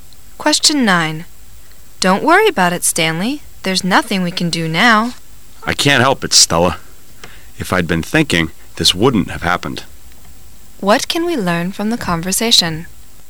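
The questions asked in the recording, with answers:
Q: What can we learn from the conversation?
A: Stanley blames himself for what happened because he wasn't thinking.

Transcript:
[解析] W: Don't worry about it, Stanley. There's nothing we can do now. M: I can't help it, Stella. If I'd been thinking, this wouldn't have happened. Q: What can we learn from the conversation?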